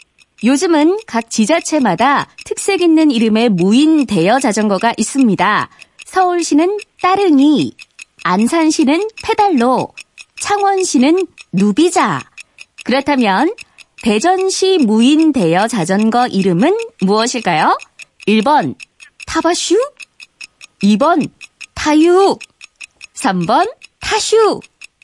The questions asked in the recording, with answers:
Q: 그렇다면 대전시 무인 대여 자전거 이름은 무엇일까요?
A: 타슈, 정답입니다.